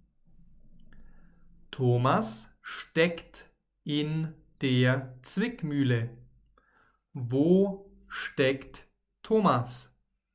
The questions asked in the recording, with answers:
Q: Wo steckt Thomas?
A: In der Zwickmühle. Er steckt in der Zwickmühle.